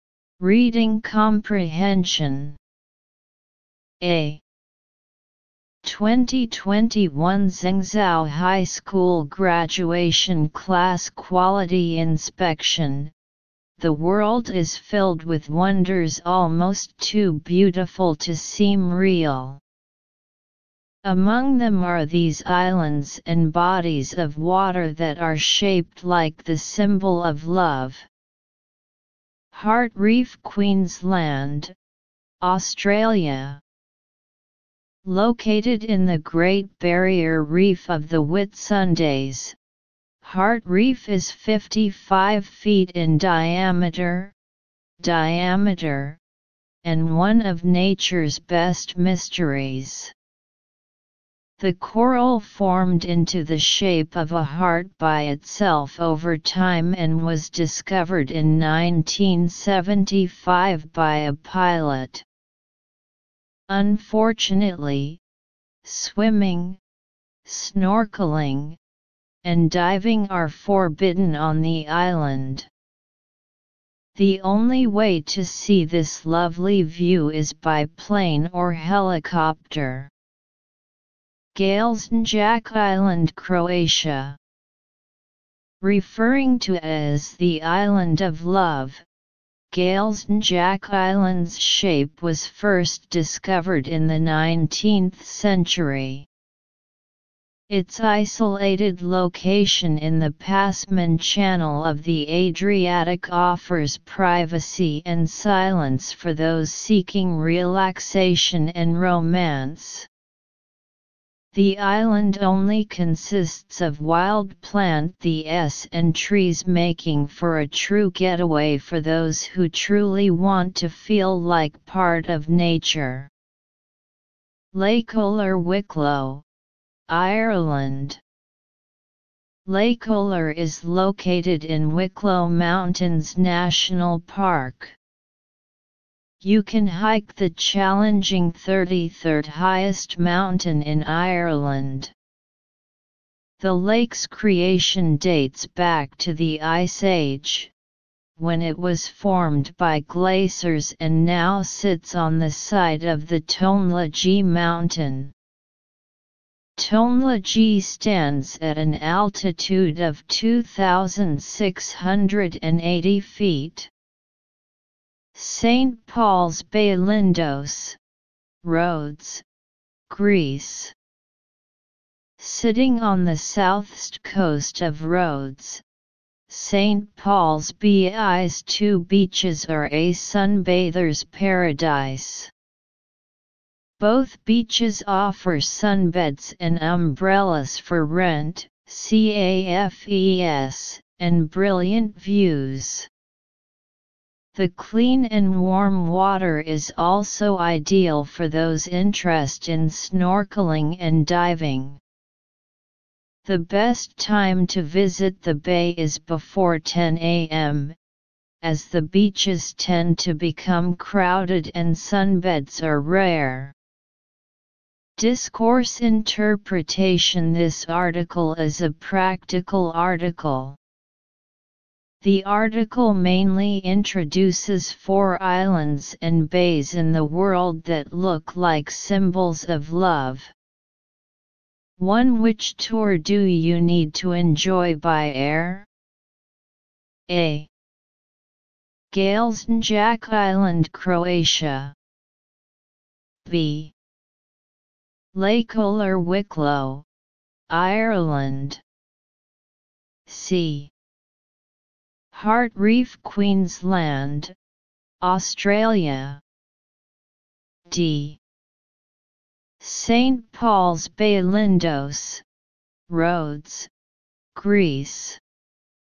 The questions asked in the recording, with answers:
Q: Which tour do you need to enjoy by air?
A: So the answer is C. Answer, C.